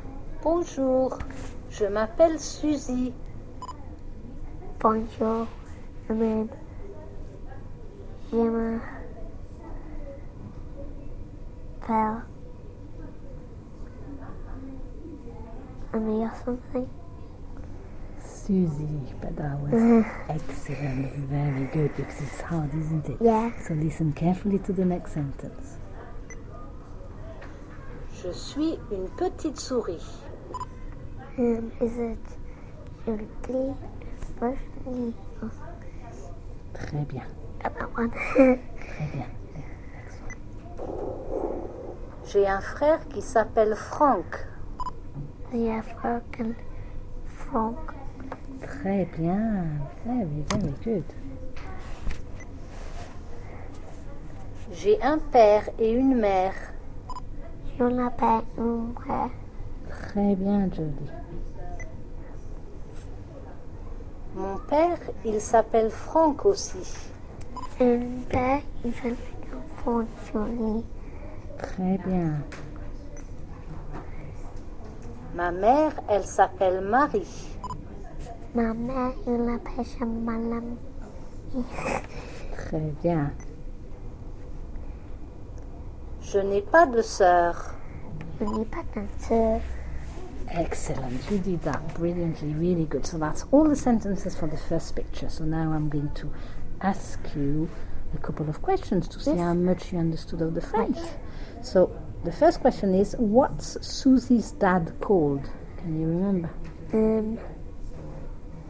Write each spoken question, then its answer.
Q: So the first question is, what's Susie's dad called?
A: Franck.